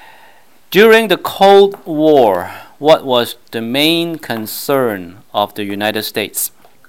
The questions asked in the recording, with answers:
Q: During the Cold War, what was the main concern of the United States?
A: 个答案是 communism, 共产主义。